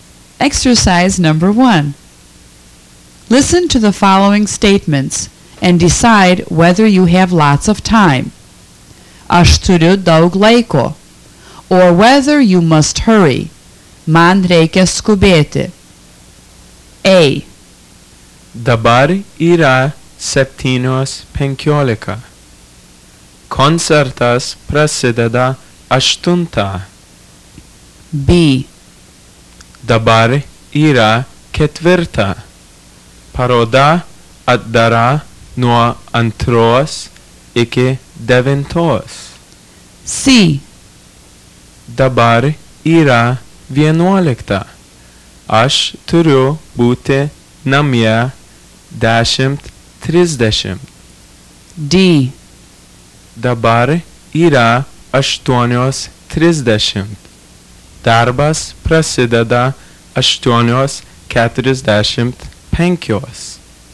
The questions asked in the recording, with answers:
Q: Dabar yra 4. Paroda atdara nuo 2 iki 9.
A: B. Have time.

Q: Dabar yra 11. Aš turiu būti namie 10:30.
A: C. Must hurry.